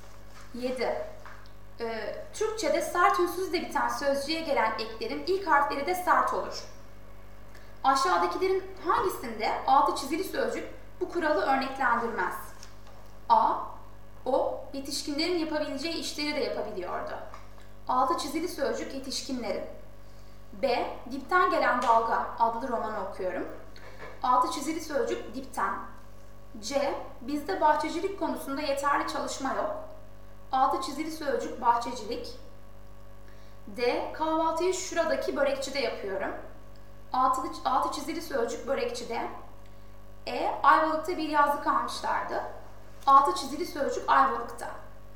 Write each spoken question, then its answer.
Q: Aşağıdakilerin hangisinde altı çizili sözcük bu kuralı örneklendirmez?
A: Doğru yanıt C.